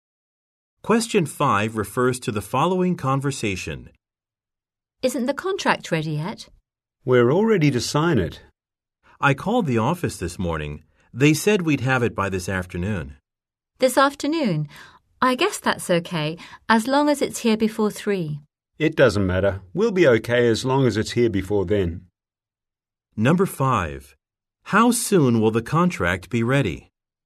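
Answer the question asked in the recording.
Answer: By this afternoon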